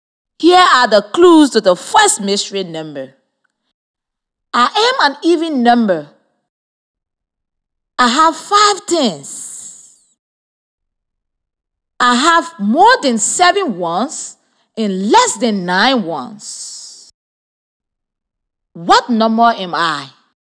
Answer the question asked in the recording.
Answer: The mystery number is 58.